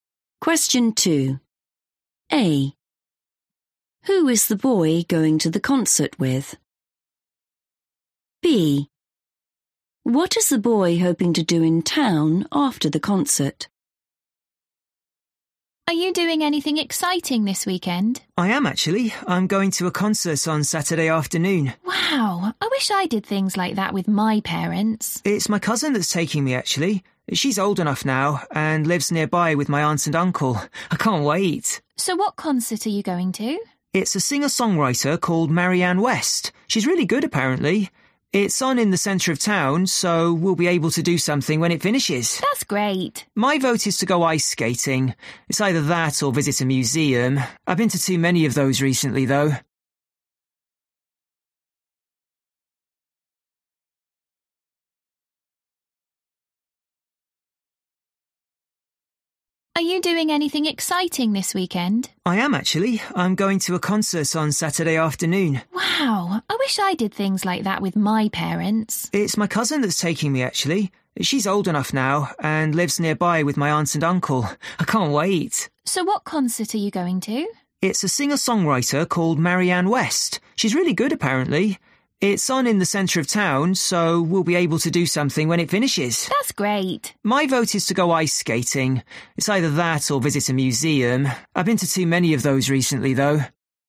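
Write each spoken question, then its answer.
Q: Who is the boy going to the concert with?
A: his cousin

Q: What is the boy hoping to do in town after the concert?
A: go ice skating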